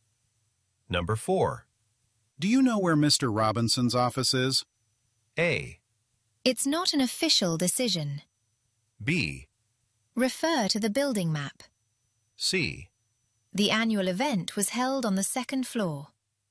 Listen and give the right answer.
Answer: 참조해 보세요. 정답이 되겠죠.